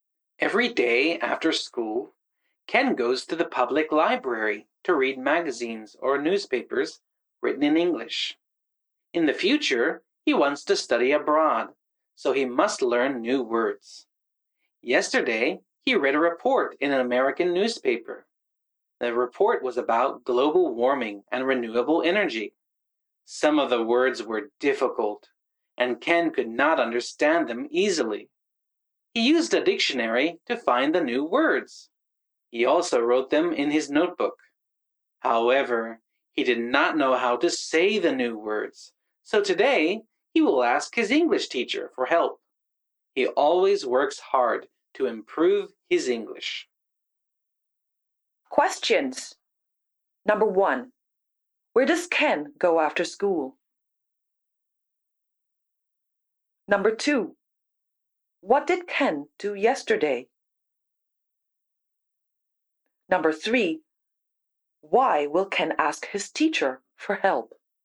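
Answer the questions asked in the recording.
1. To the public library
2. He read a report in an American newspaper
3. Because he did not know how to say the new words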